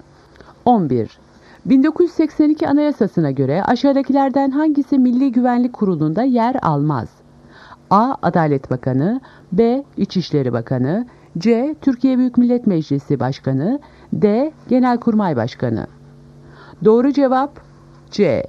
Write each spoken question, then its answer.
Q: 1982 Anayasası'na göre aşağıdakilerden hangisi Milli Güvenlik Kurulu'nda yer almaz?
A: Doğru cevap C. Türkiye Büyük Millet Meclisi Başkanı.